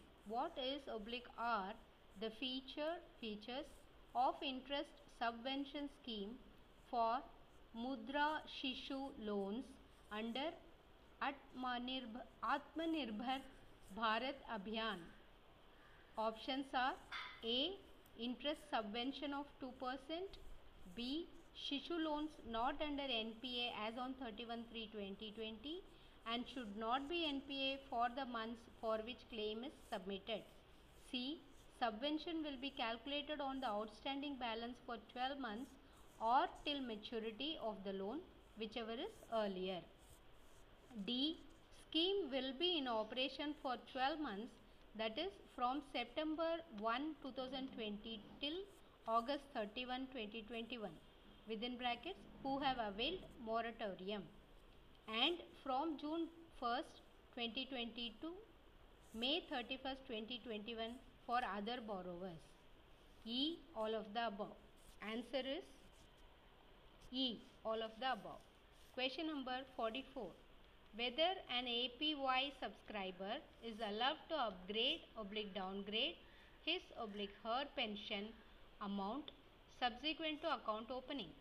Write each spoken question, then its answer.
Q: What is oblique R the feature features of interest subvention scheme for Mudra Shishu loans under Atmanirbh Atmanirbhar Bharat Abhiyan.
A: answer is E all of the above